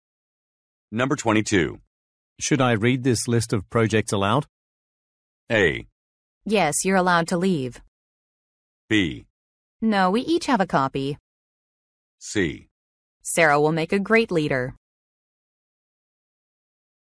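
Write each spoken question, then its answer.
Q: Should I read this list of projects aloud?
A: B: No, we each have a copy.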